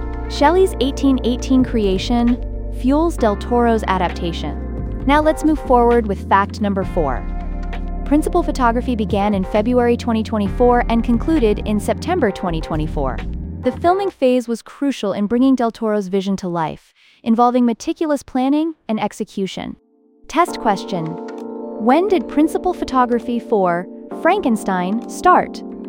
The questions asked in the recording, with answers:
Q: when did principal photography for Frankenstein start?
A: February 2024.